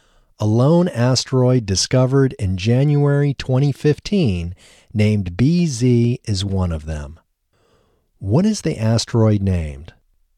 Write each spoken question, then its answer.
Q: What is the asteroid named?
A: The asteroid is named BZ.